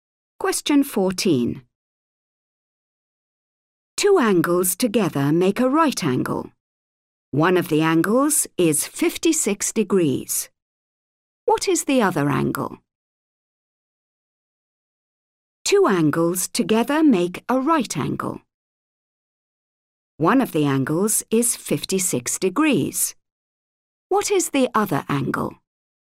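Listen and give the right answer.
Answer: 34 degrees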